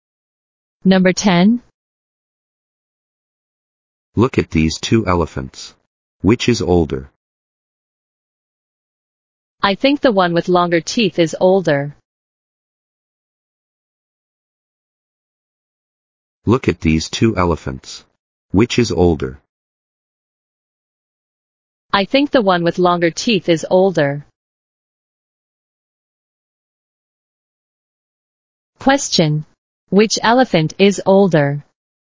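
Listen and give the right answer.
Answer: The one with longer teeth.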